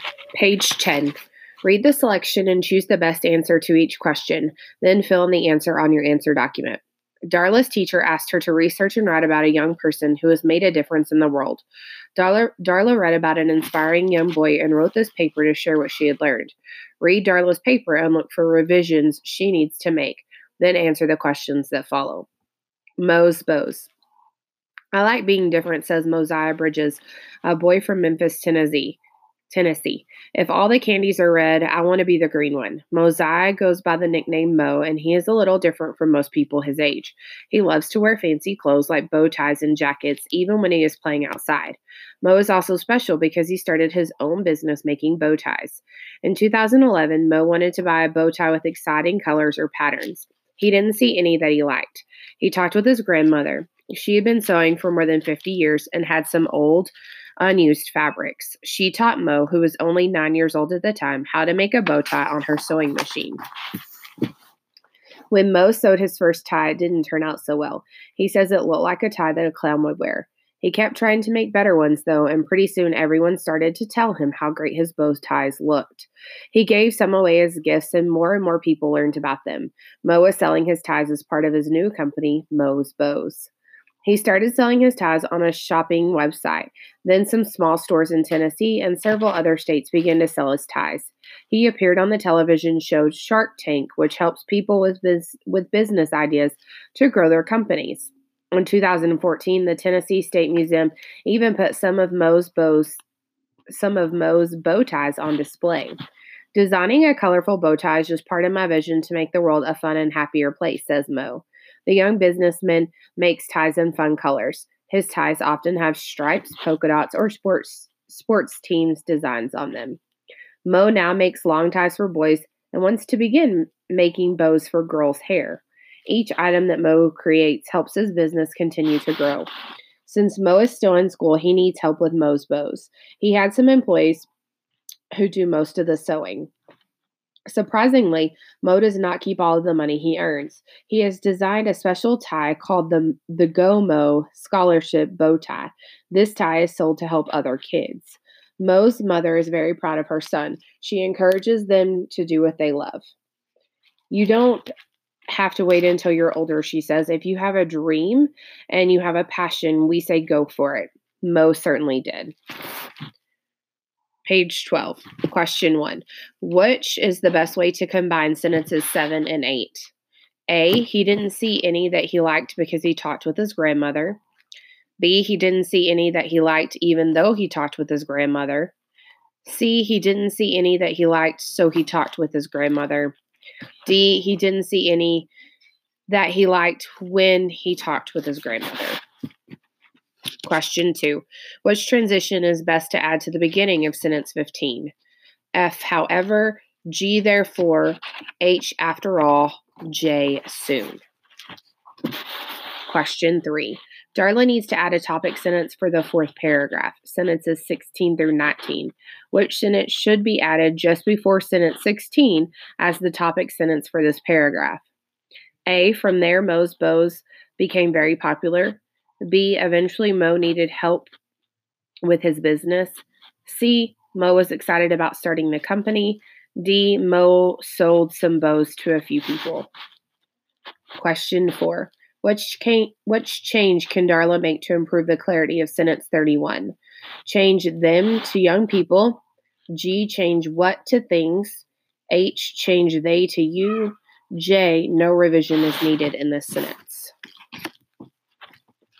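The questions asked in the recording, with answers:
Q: Which is the best way to combine sentences 7 and 8?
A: C: he didn't see any that he liked so he talked with his grandmother.

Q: Which transition is best to add to the beginning of sentence 15?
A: J: soon

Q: Which sentence should be added just before sentence 16 as the topic sentence for this paragraph?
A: A: from there, Mo's bows became very popular.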